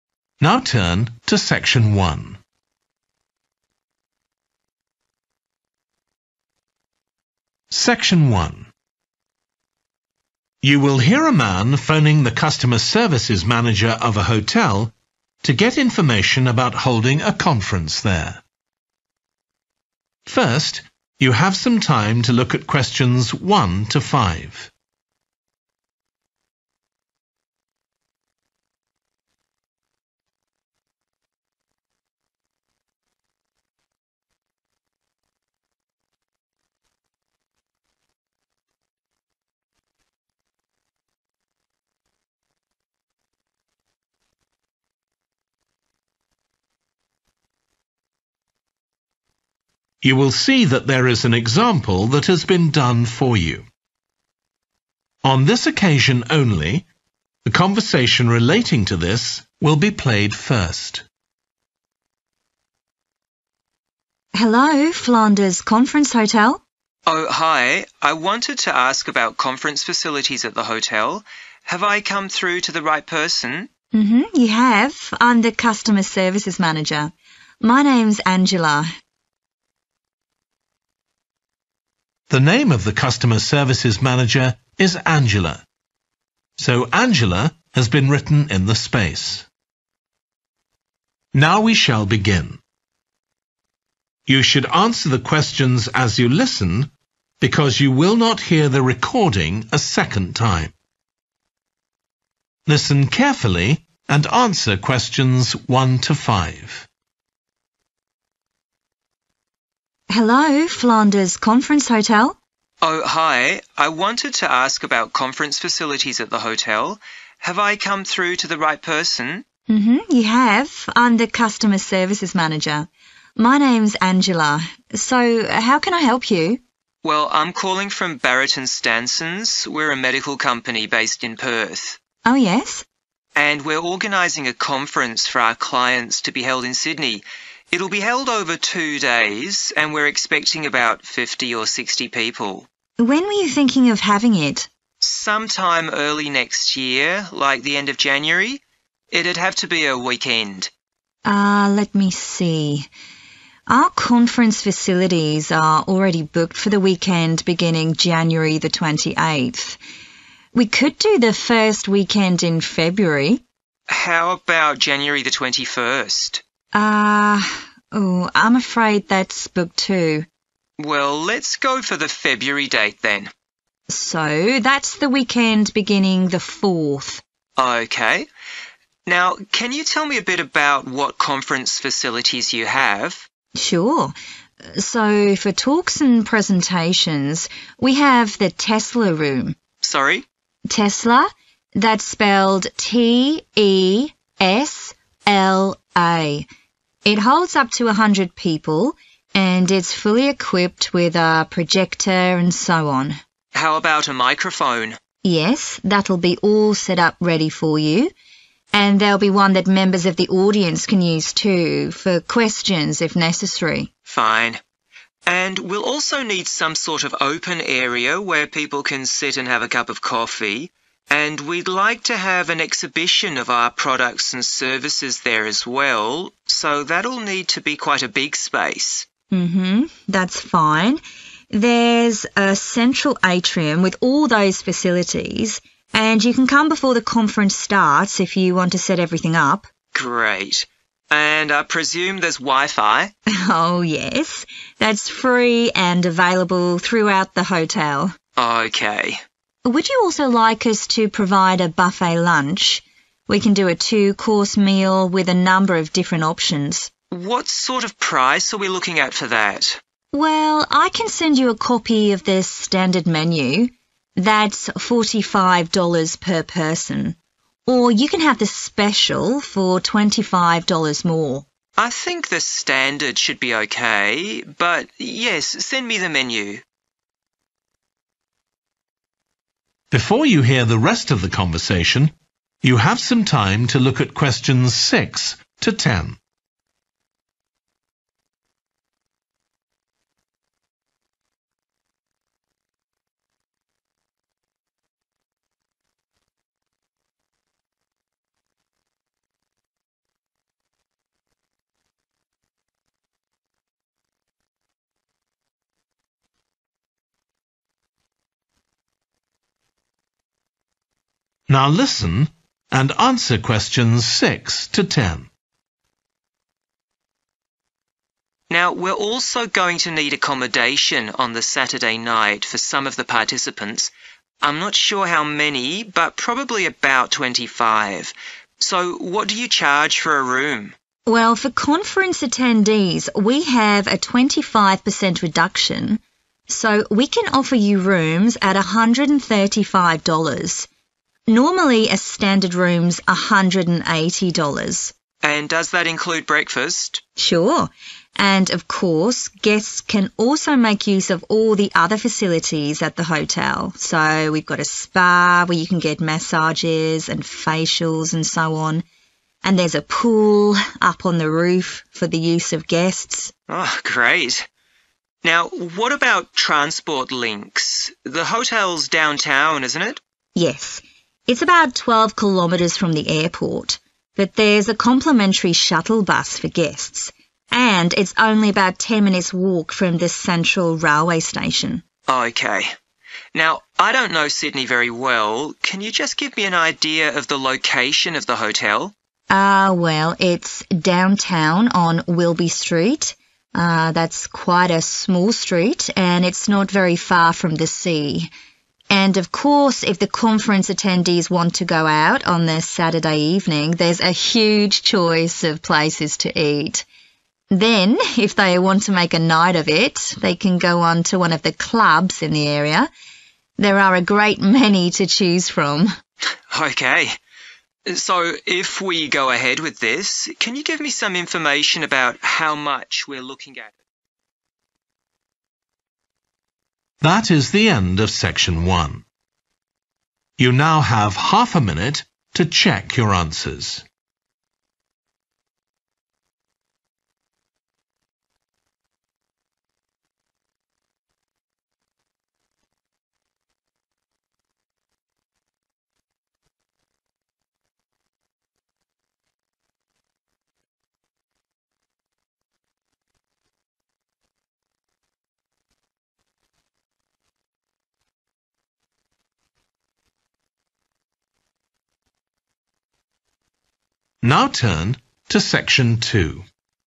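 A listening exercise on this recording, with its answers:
Complete the notes below.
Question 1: - the 1 ...................... room for talks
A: Tesla

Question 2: - (projector and 2 .......................... available)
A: microphone

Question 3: - area for coffee and an 3 ........................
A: exhibition

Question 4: - free 4 ...........................throughout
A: Wi-Fi

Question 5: - a standard buffet lunch costs 5 $ ....................per head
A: 45

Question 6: - Rooms will cost 6 $ .....................including breakfast.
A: 135

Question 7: - The hotel also has a spa and rooftop 7 .......................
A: pool

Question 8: - There's a free shuttle service to the 8 ............................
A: airport

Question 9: - Wilby Street (quite near the 9 .....................)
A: sea

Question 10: - near to restaurants and many 10 .......................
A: clubs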